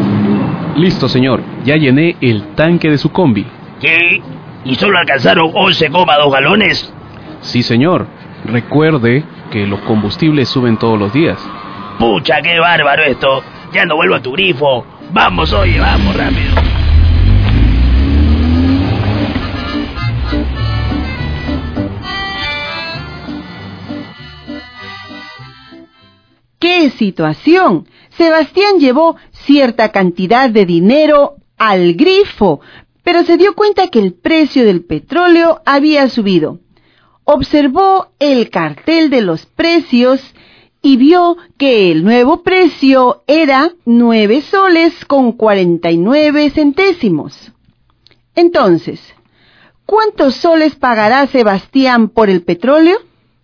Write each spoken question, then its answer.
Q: Entonces, ¿cuántos soles pagará Sebastián por el petróleo?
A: Sebastián deberá pagar 106 soles con 30 céntimos.